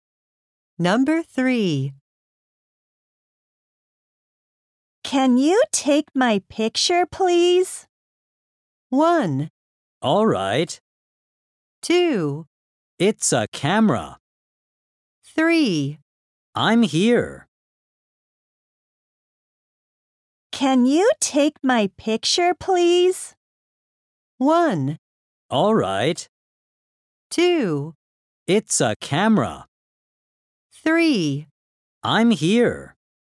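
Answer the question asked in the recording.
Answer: 1: All right.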